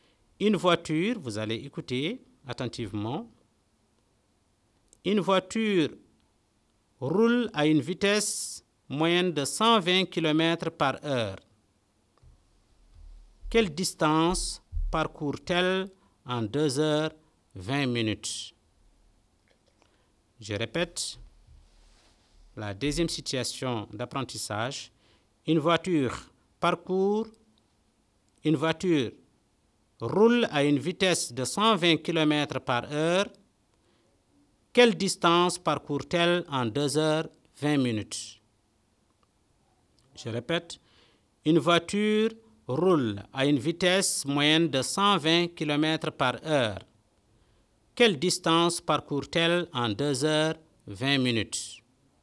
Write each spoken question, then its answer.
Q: Quelle distance parcourt-elle en 2h20 minutes?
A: Donc nous aurons 120 fois 140 divisé par 60 est égal à 280 km.